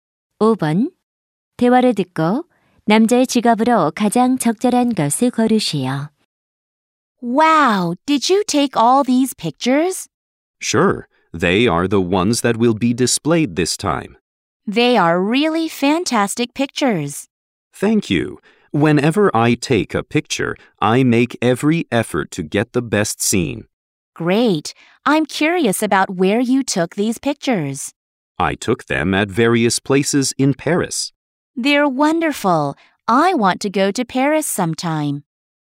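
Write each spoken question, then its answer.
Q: 대화를 듣고 남자의 직업으로 가장 적절한 것을 고르시오.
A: 사진작가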